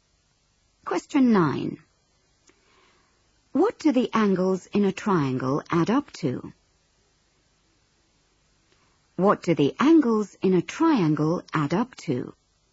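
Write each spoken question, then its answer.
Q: What do the angles in a triangle add up to?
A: 180 degrees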